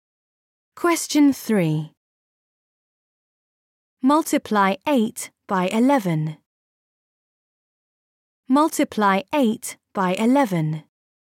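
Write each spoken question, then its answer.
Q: Multiply 8 by 11.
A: 88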